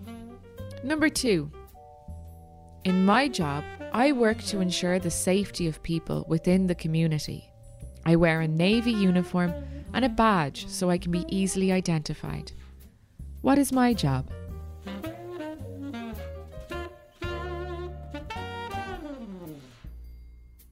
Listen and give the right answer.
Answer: I'm a Garda, a policeman, or a policewoman.